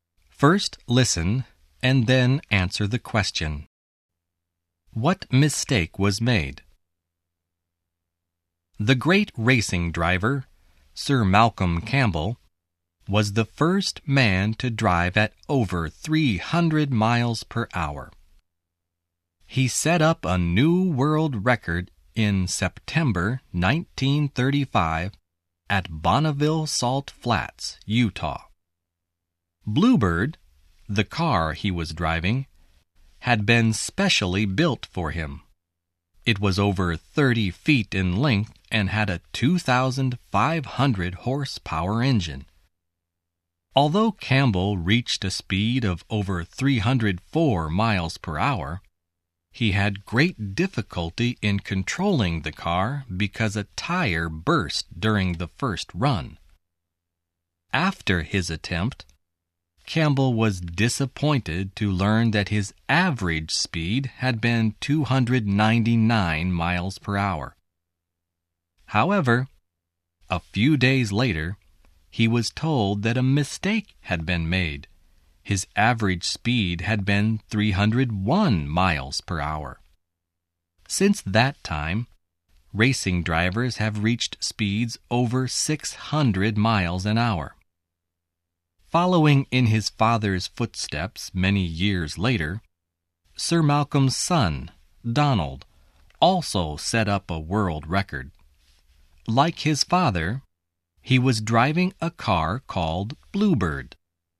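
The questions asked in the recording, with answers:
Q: What mistake was made?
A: His average speed was wrongly given as 299 miles per hour; it had actually been 301 miles per hour.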